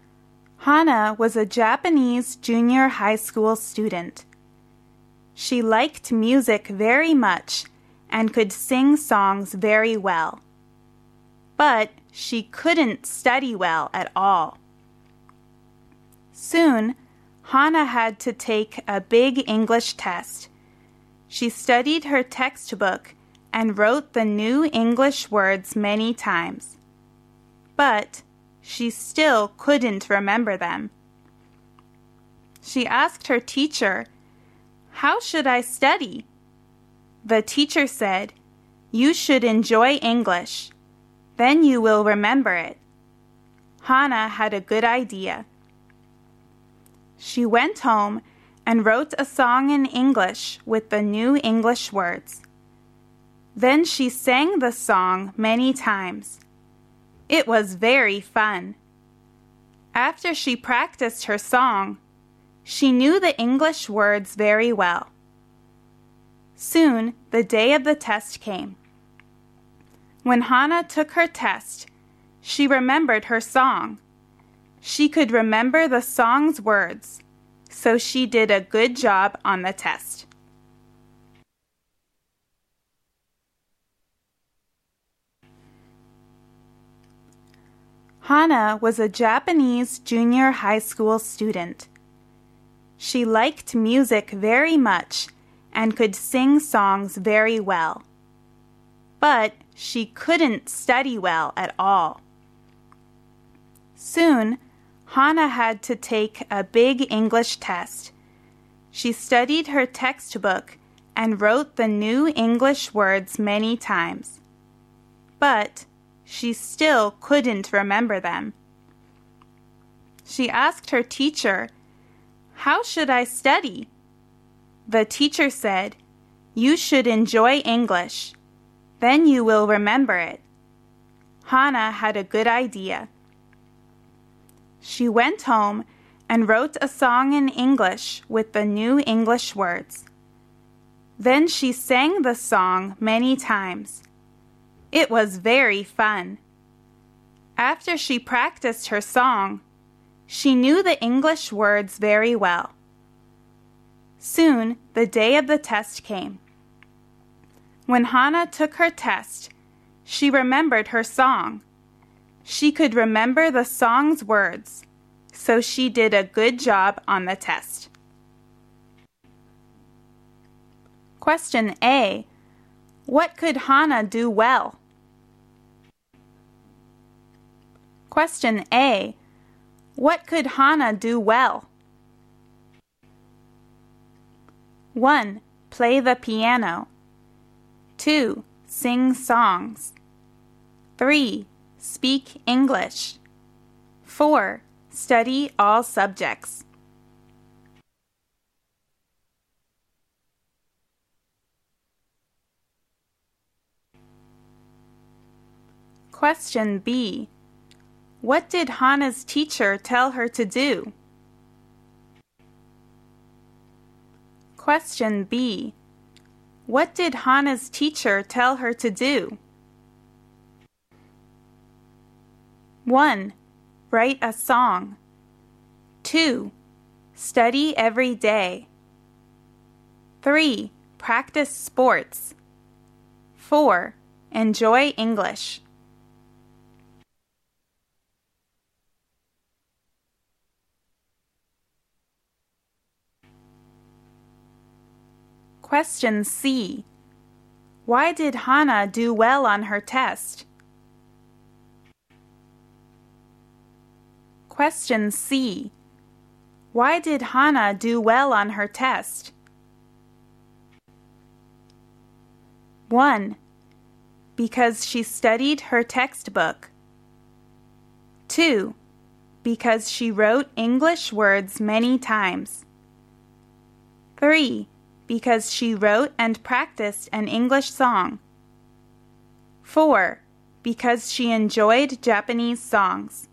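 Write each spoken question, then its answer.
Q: What could Hana do well?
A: 2: Sing songs.

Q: What did Hana's teacher tell her to do?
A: 4: Enjoy English.

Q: Why did Hana do well on her test?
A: 3: Because she wrote and practiced an English song.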